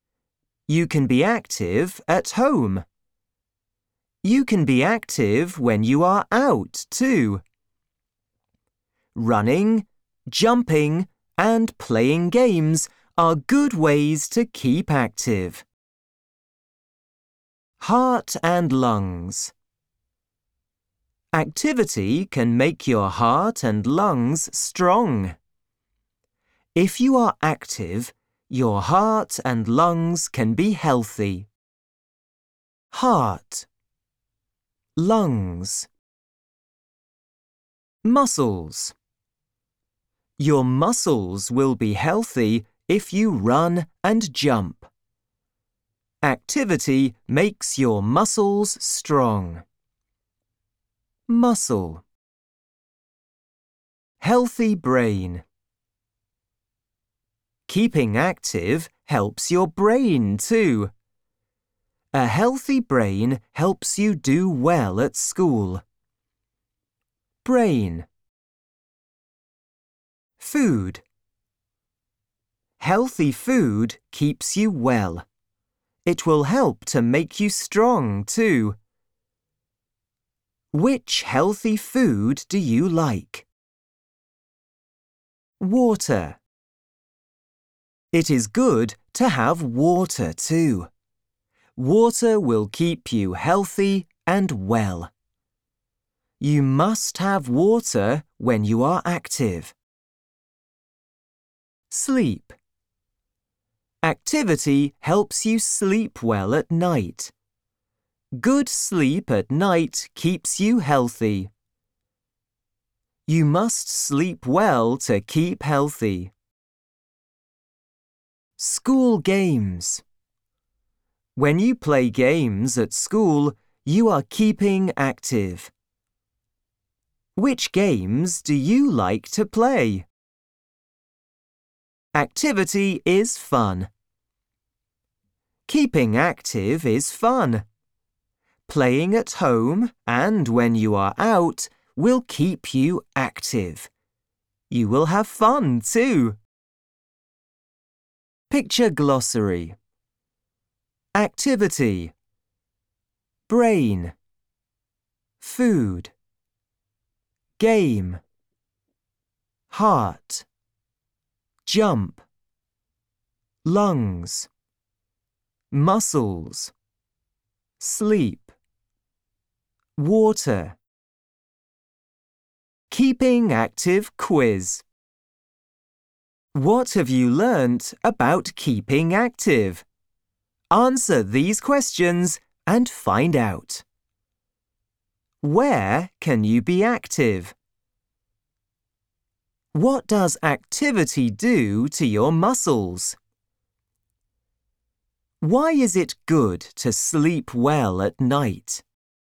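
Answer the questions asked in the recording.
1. At home and when you are out
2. It makes them strong
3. Good sleep keeps you healthy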